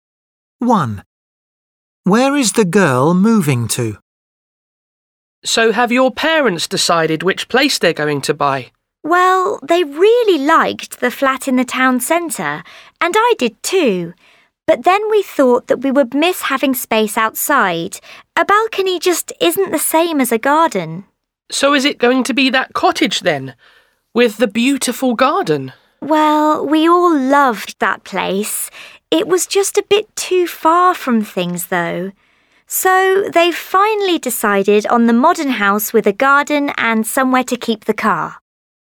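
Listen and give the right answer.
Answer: a modern house with a garden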